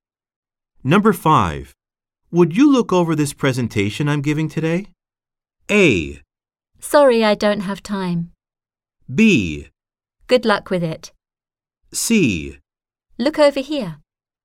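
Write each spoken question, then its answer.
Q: Would you look over this presentation I'm giving today?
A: A: Sorry, I don't have time.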